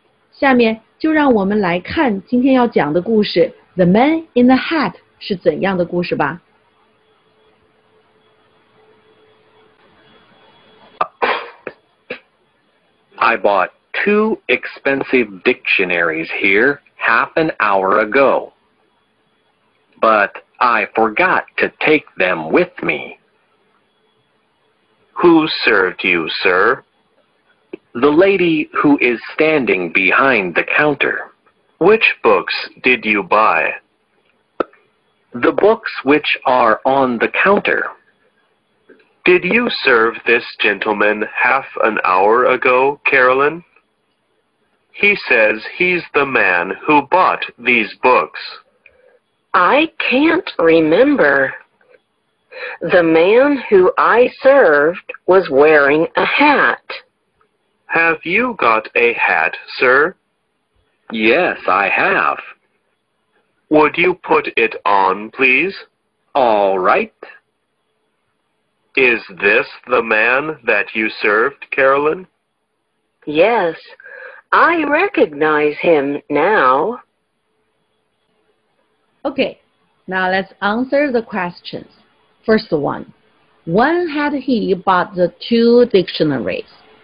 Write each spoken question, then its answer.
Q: First one, when had he bought the two dictionaries?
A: Half an hour earlier.